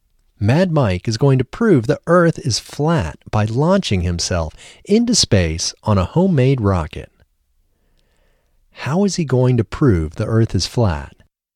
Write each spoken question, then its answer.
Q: How is he going to prove the Earth is flat?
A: He is going to prove the Earth is flat by launching himself into space on a homemade rocket.